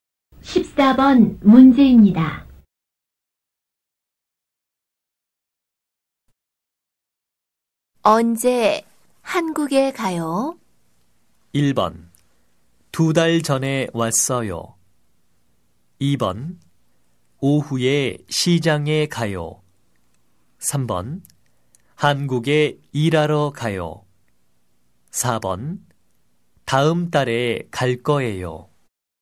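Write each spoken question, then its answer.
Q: 언제 한국에 가요?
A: 4: 다음 달에 갈 거예요.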